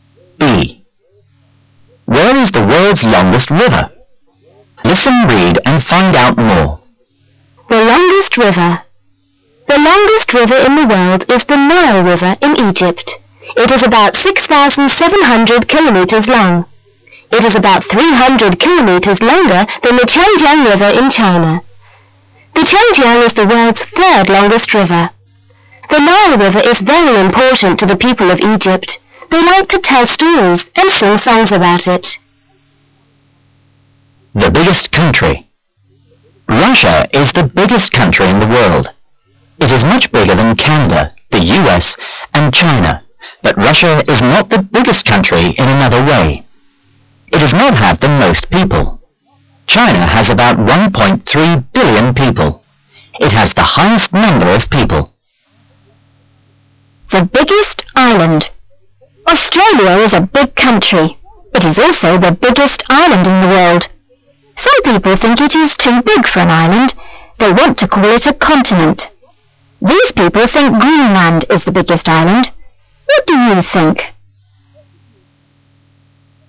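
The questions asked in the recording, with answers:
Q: Where is the world's longest river?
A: In Egypt (the Nile River)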